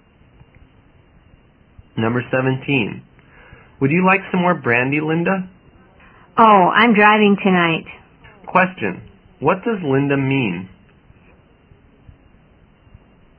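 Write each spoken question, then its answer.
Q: what does Linda mean?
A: She doesn't want more brandy because she is driving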